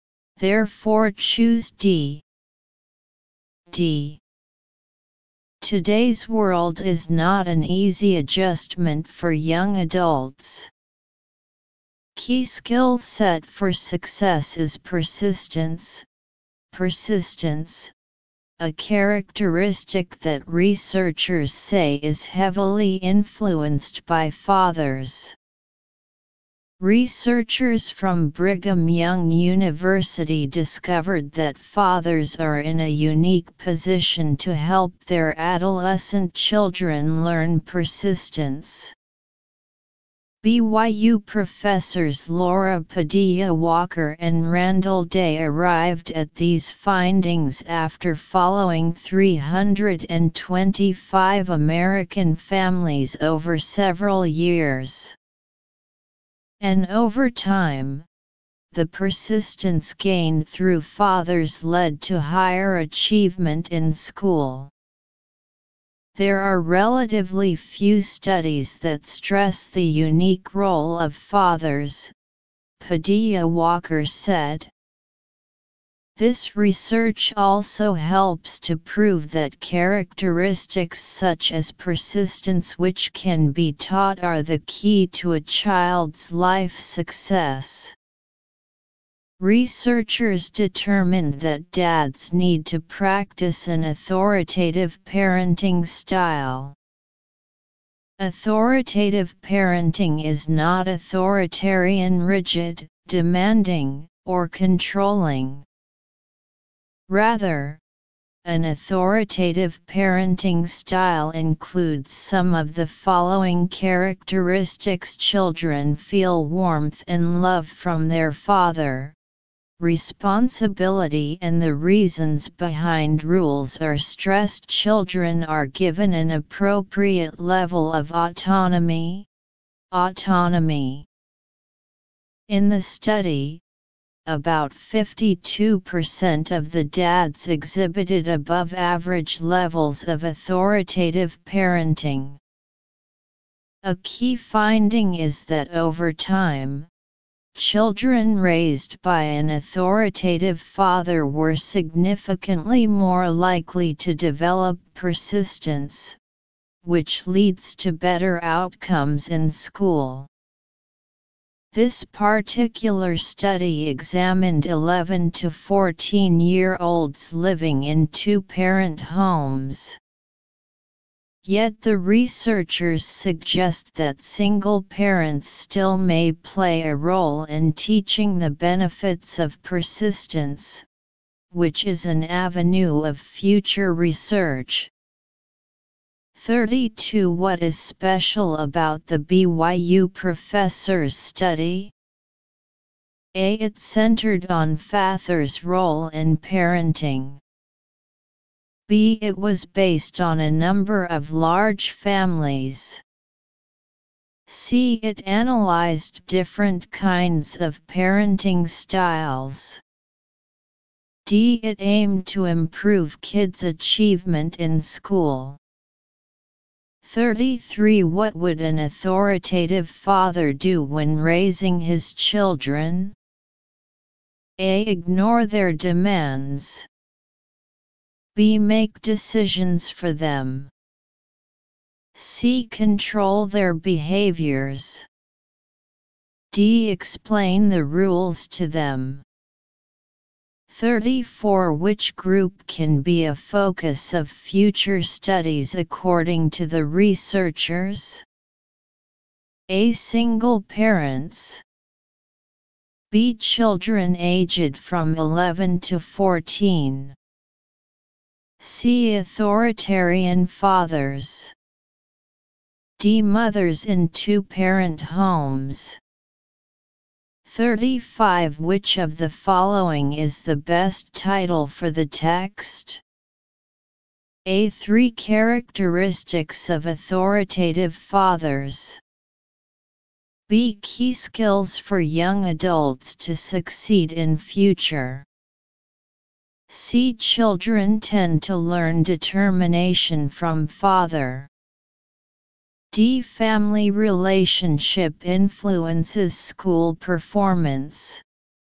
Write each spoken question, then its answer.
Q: What is special about the BYU professor's study?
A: 32. A.

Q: What would an authoritative father do when raising his children?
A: 33. D.

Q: Which group can be a focus of future studies according to the researchers?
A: 34. A.

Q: Which of the following is the best title for the text?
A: 35. C.